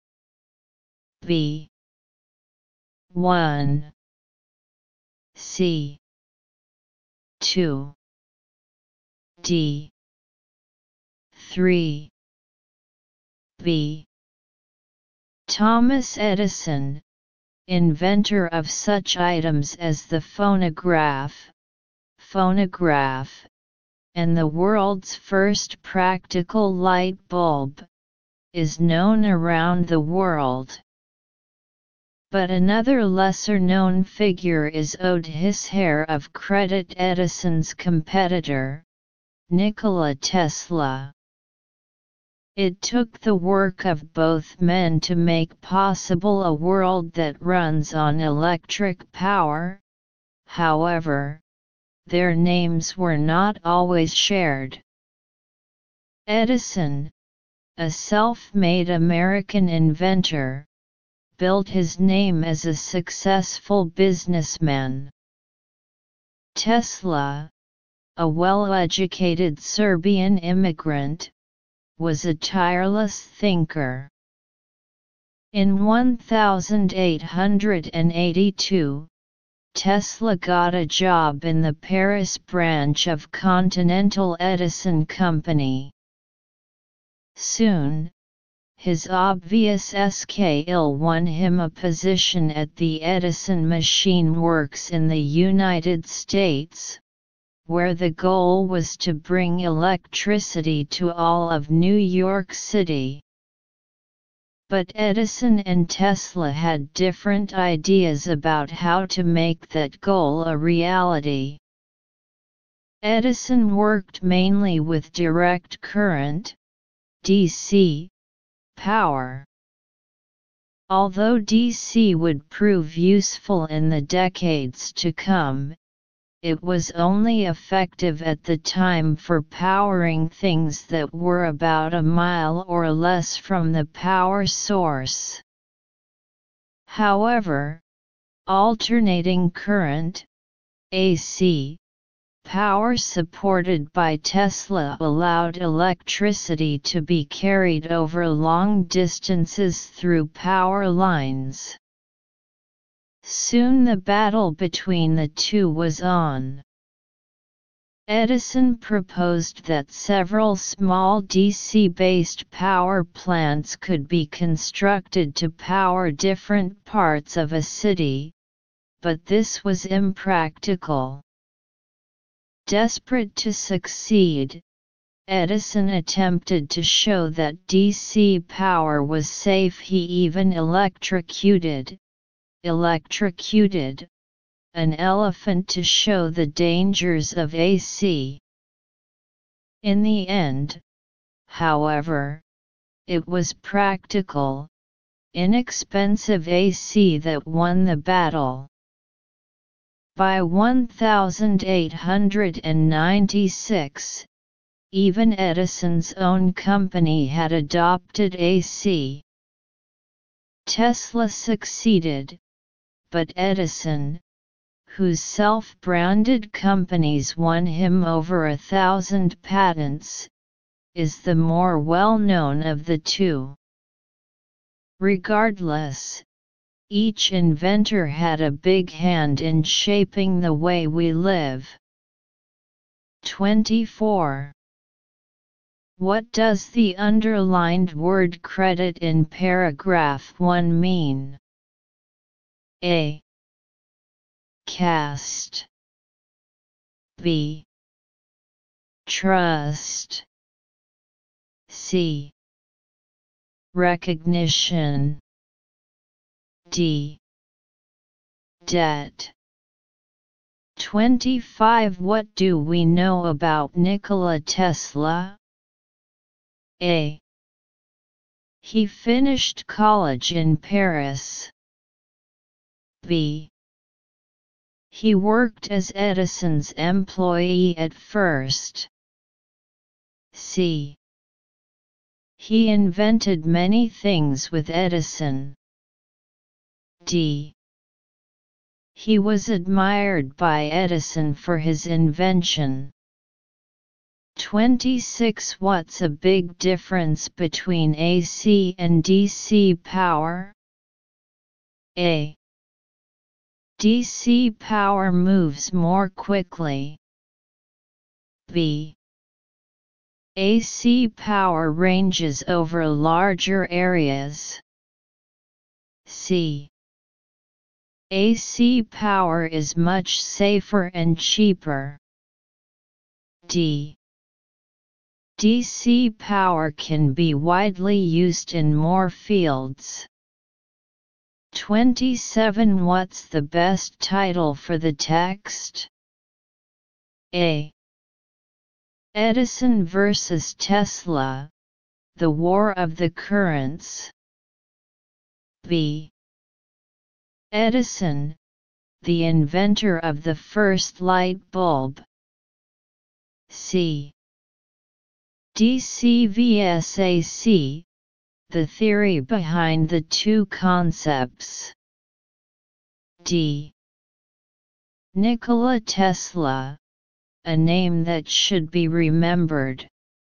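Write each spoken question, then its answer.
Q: What does the underlined word credit in paragraph 1 mean?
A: C: Recognition.

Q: What do we know about Nikola Tesla?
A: B: He worked as Edison's employee at first.

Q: What's a big difference between AC and DC power?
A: B: AC power ranges over larger areas.

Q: What's the best title for the text?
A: A: Edison versus Tesla, The War of the Currents.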